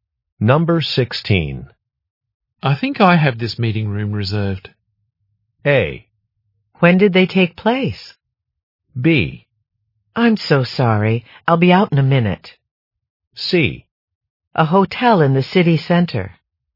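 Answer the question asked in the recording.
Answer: B: I'm so sorry. I'll be out in a minute.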